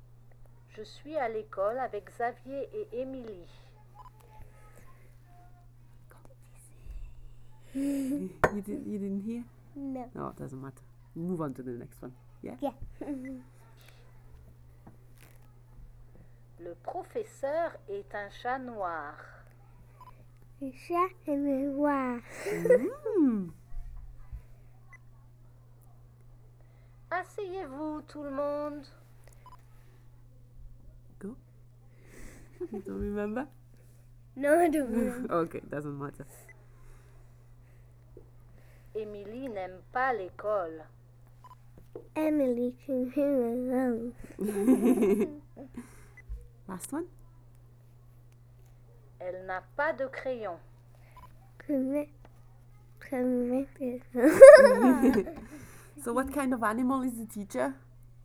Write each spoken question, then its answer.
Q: So what kind of animal is the teacher?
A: A cat.